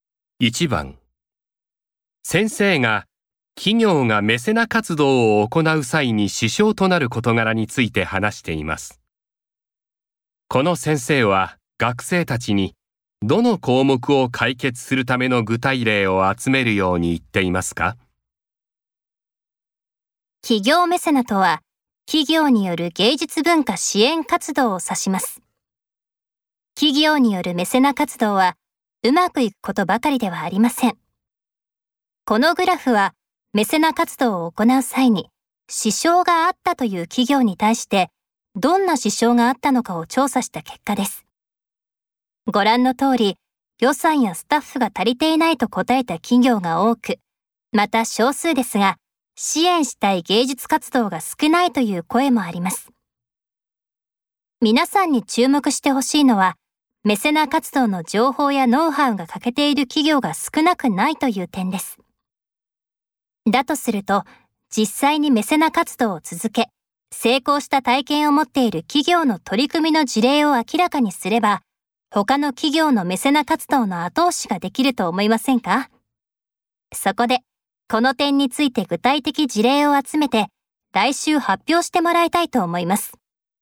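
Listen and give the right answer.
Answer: メセナ活動の情報やノウハウが欠けていること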